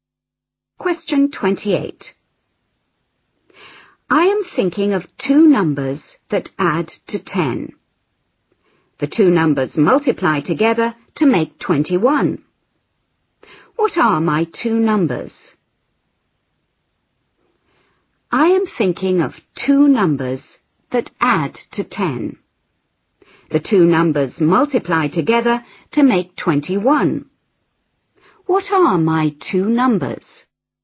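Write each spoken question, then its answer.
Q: What are my two numbers?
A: 3 and 7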